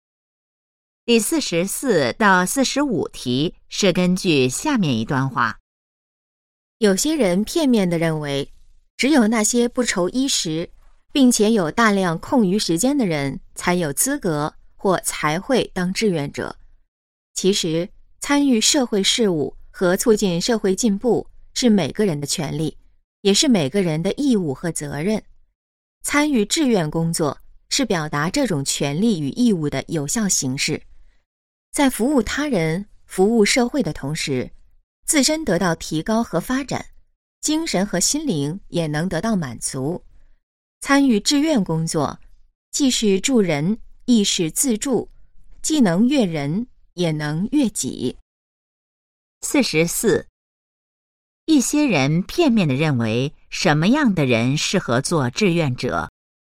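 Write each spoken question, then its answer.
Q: 一些人片面地认为,什么样的人适合做志愿者?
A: 不愁衣食、有大量空余时间的人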